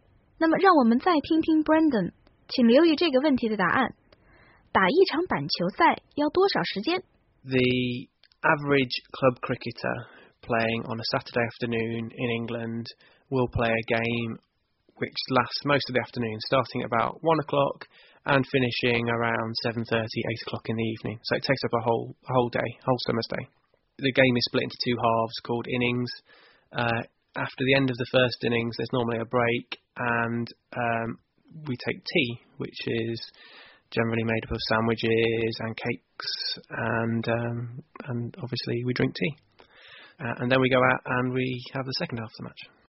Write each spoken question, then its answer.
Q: 打一场板球赛要多少时间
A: A cricket match typically lasts a whole summer's day, from around 1 p.m.